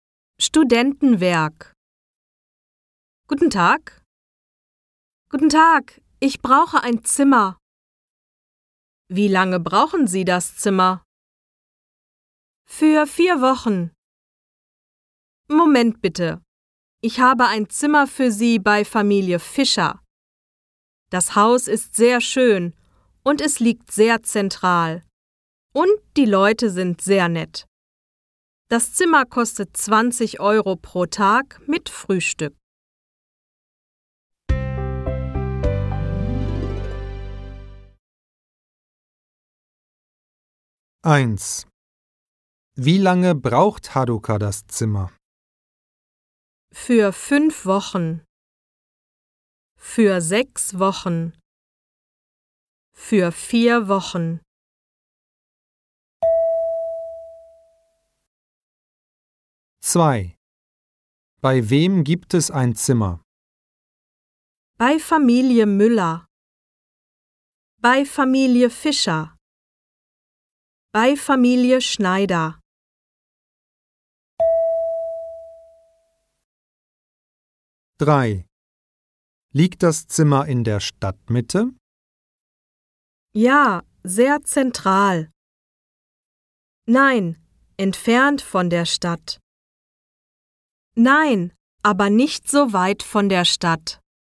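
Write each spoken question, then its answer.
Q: Wie lange braucht Haruka das Zimmer?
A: Für 4 Wochen

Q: Bei wem gibt es ein Zimmer?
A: Bei Familie Fischer

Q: Liegt das Zimmer in der Stadtmitte?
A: Ja, sehr zentral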